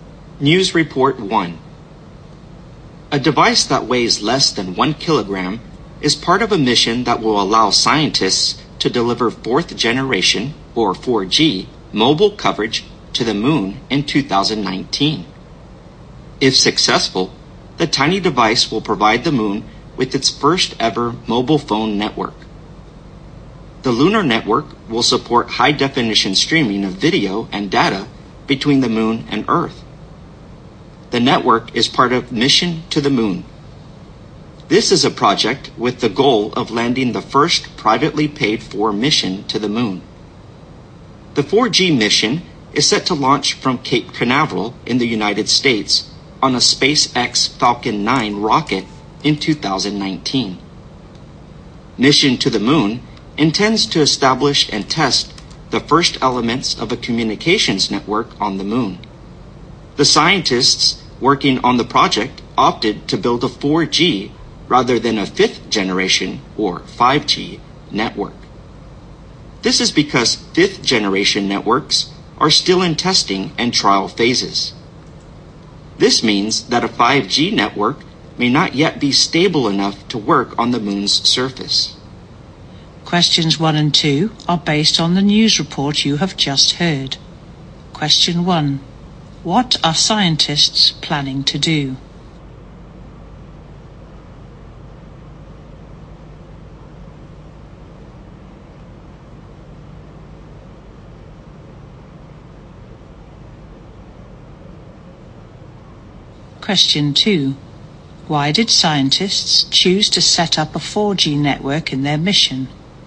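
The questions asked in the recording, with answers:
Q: What are scientists planning to do?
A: Set up a 4G mobile network on the moon in 2019

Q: Why did scientists choose to set up a 4G network in their mission?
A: 5G networks are still being tested and may not be stable enough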